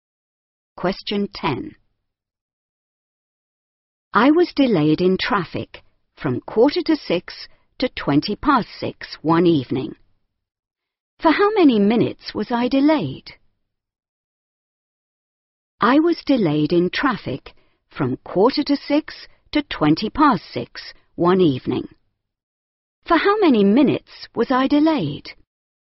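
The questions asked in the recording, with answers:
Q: For how many minutes was I delayed?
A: 35 minutes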